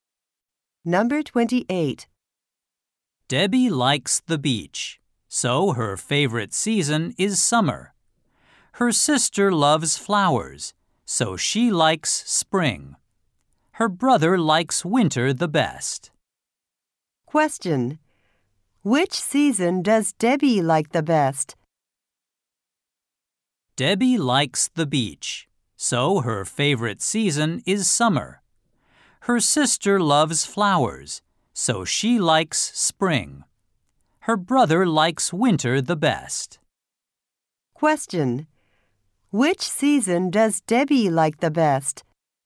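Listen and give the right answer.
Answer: Summer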